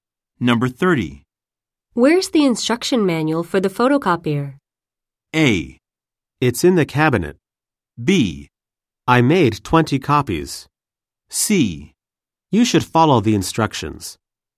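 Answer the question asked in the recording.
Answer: A: It's in the cabinet.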